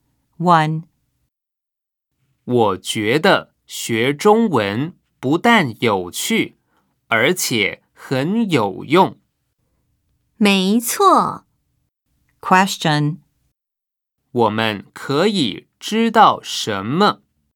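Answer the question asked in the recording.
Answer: 学中文既有趣又有用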